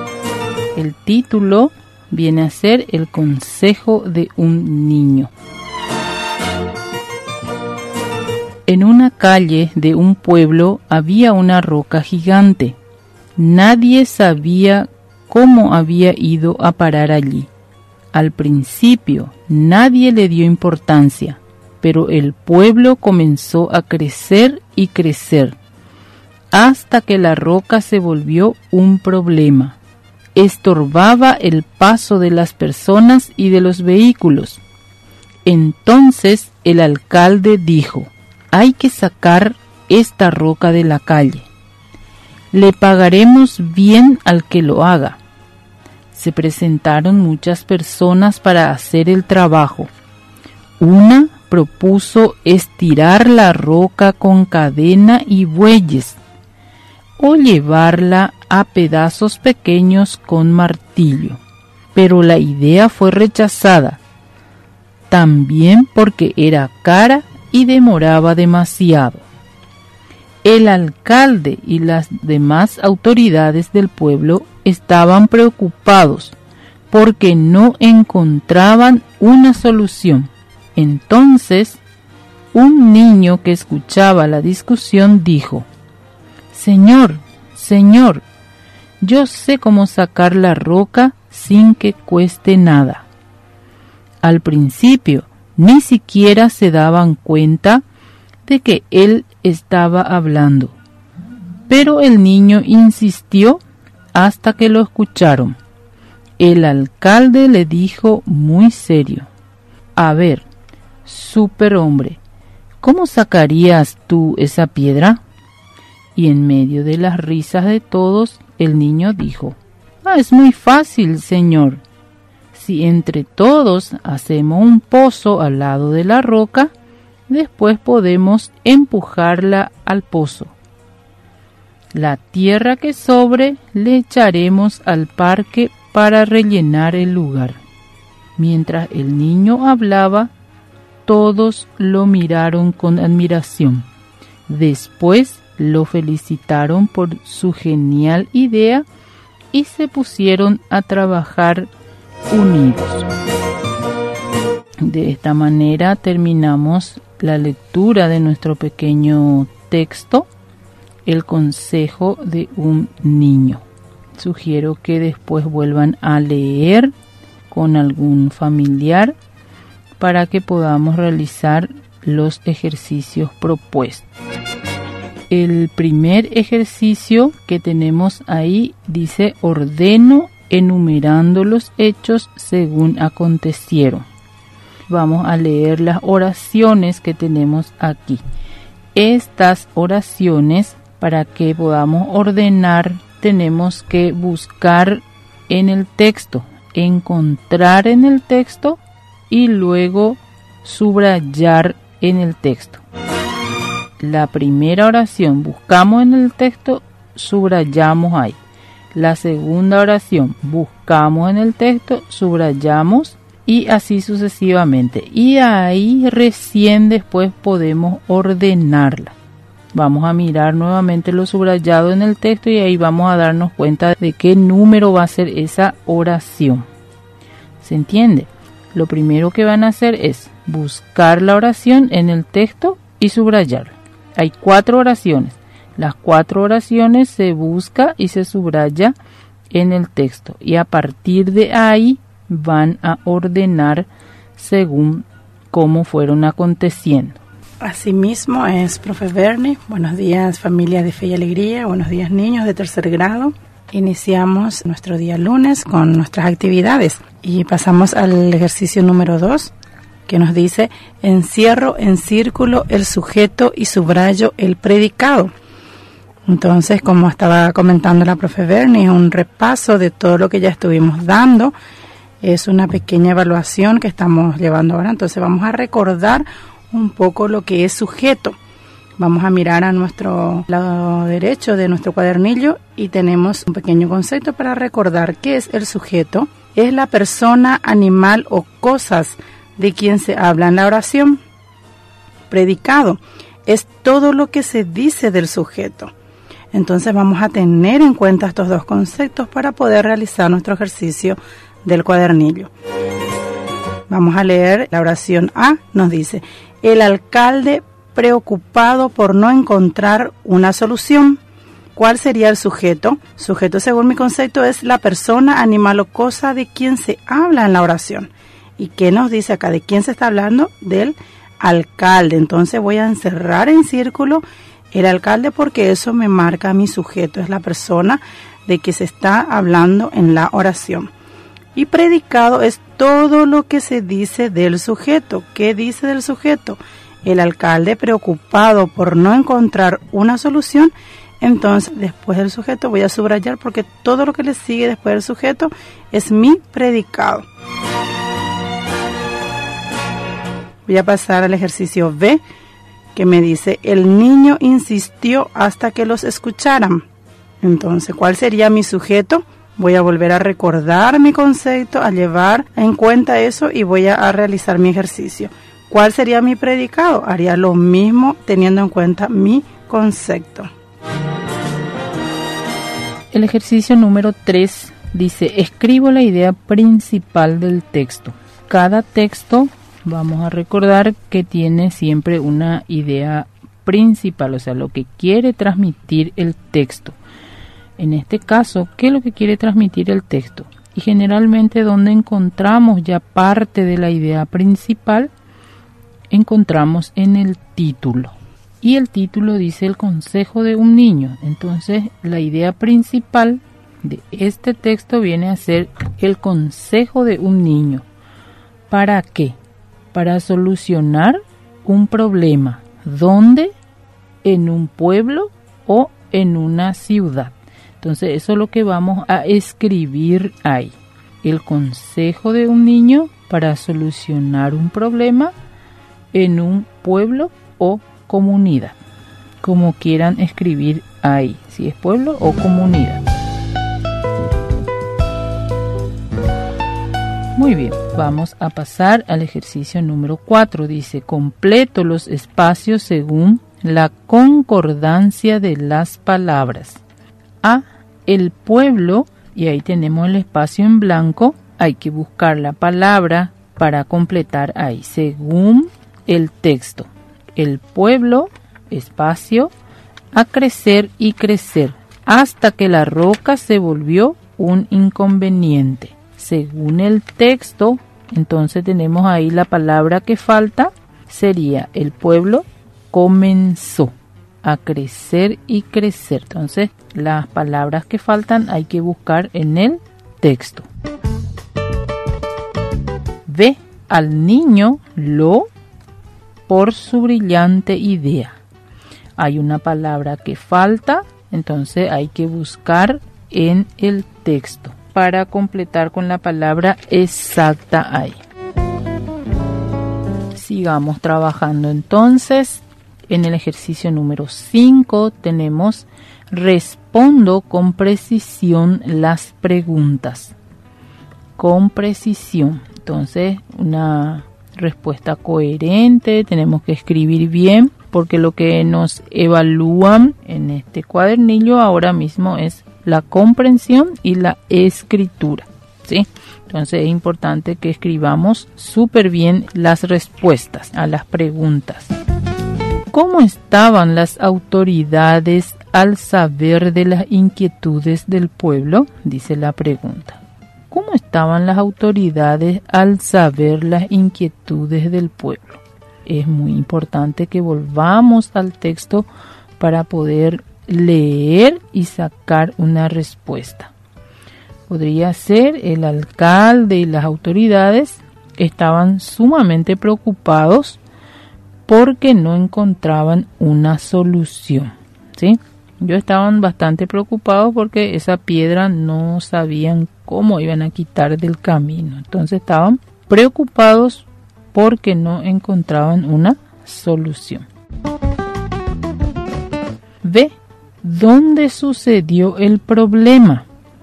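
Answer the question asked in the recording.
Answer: En una calle de un pueblo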